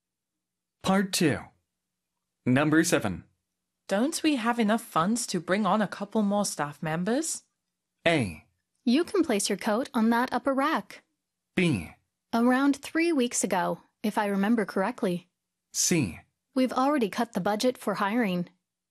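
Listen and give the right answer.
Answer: C: We've already cut the budget for hiring.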